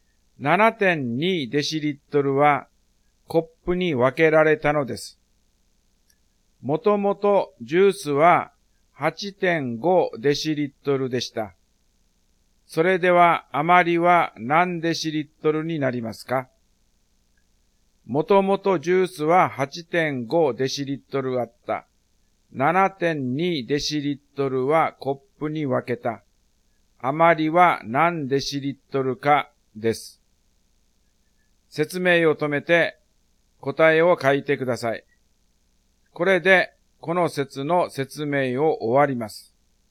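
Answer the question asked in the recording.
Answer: 1.3デシリットル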